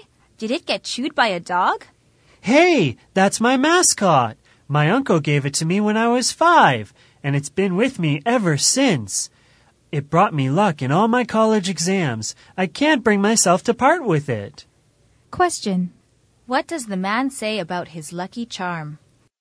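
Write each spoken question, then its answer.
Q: What does the man say about his lucky charm?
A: He has had it since he was 5 and can't part with it; it brought him luck in his exams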